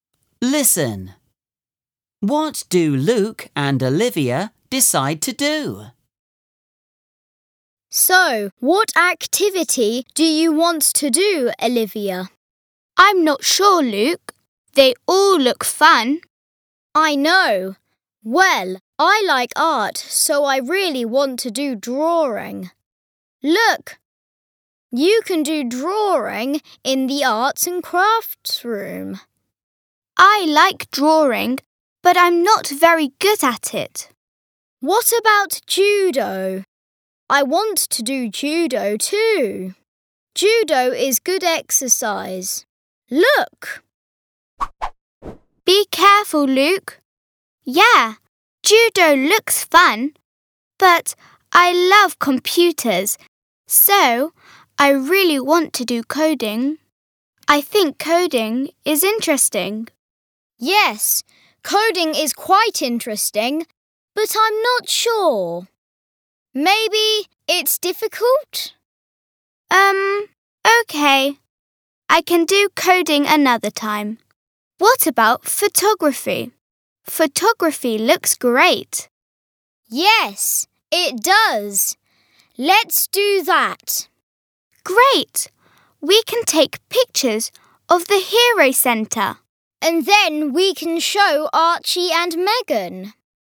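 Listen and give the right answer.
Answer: photography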